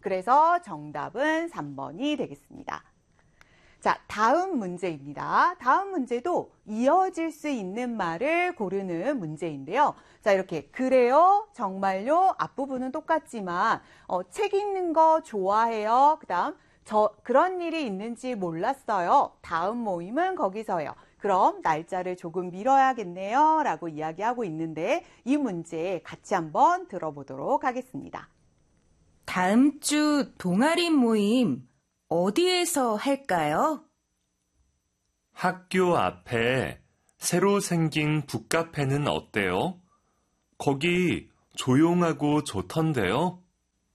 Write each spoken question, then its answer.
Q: 다음 문제도 이어질 수 있는 말을 고르는 문제인데요.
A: 그럼 다음 모임은 거기서 해요.